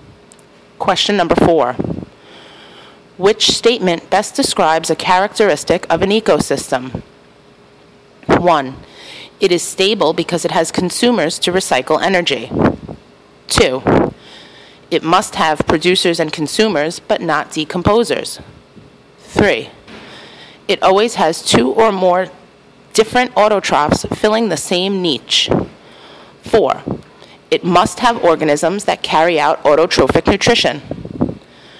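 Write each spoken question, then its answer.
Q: Which statement best describes a characteristic of an ecosystem?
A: 4: It must have organisms that carry out autotrophic nutrition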